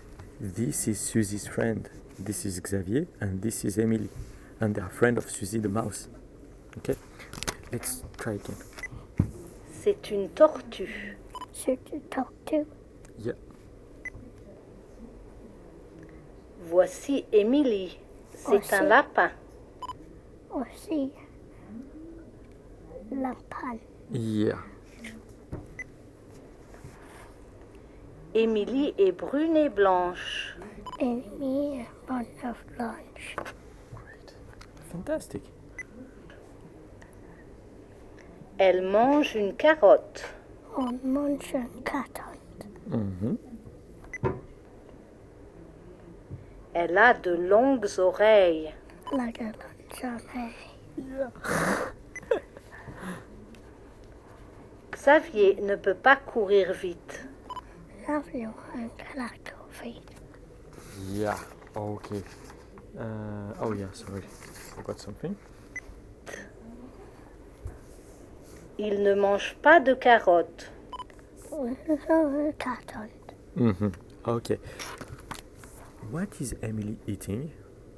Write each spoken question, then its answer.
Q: What is Emily eating?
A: A carrot.